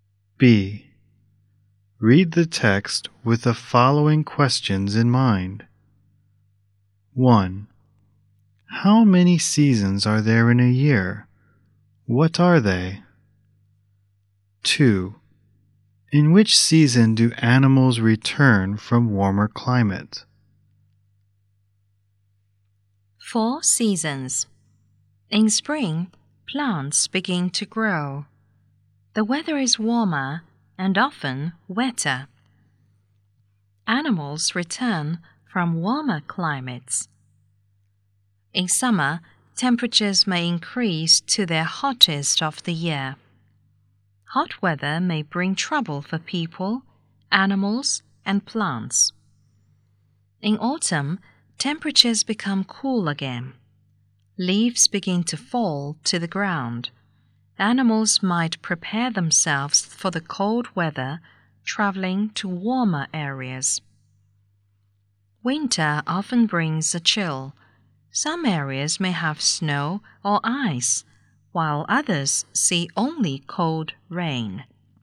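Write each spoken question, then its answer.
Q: How many seasons are there in a year? What are they?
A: Four: spring, summer, autumn and winter

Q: In which season do animals return from warmer climate?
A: Spring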